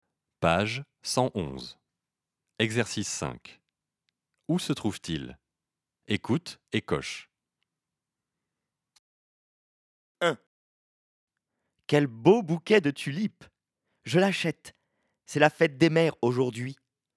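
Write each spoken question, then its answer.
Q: Où se trouve-t-il ?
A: Chez le fleuriste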